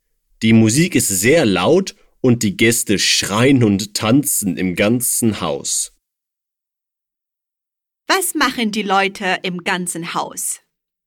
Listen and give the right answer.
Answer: Sie schreien und tanzen.